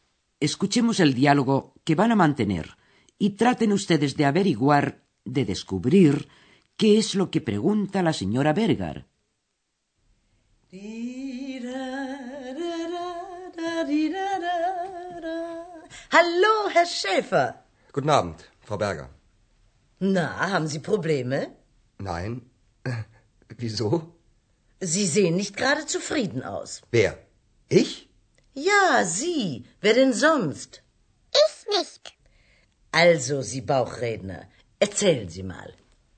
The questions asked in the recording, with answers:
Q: traten ustedes de averiguar, de descubrir, qué es lo que pregunta la señora Berger.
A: Así pues, la señora Bergar le pregunta a Andreas si es que tiene problemas.